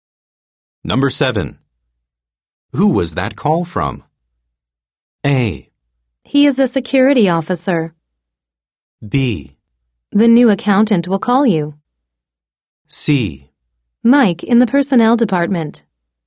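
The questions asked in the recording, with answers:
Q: Who was that call from?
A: C: Mike in the personnel department.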